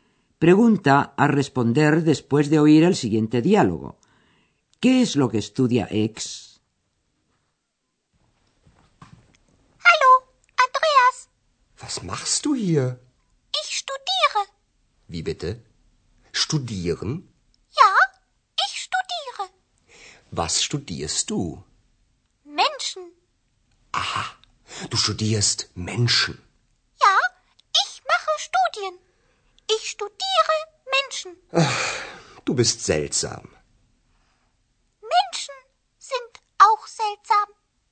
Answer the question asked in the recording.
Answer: Así que ex estudia a los seres humanos